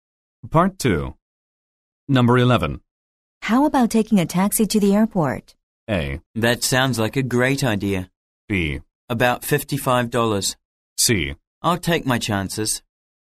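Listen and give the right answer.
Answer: A: That sounds like a great idea.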